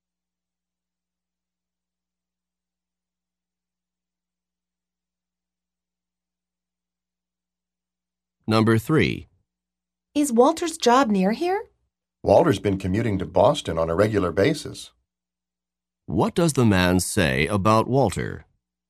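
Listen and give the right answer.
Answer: Walter regularly commutes to Boston, so his job isn't near here.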